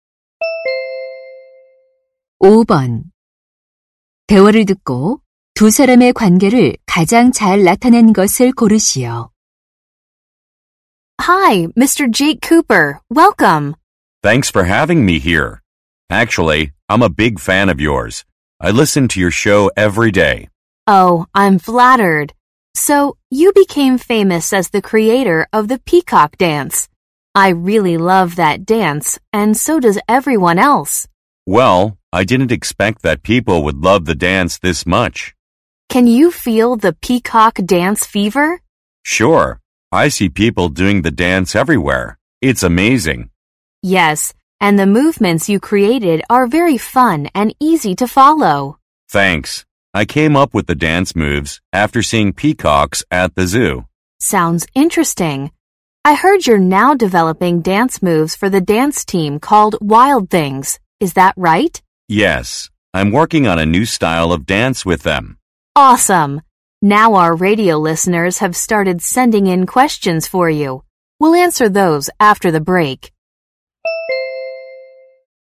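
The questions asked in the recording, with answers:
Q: 대화를 듣고 두 사람의 관계를 가장 잘 나타낸 것을 고르시오.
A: 라디오 진행자 - 안무가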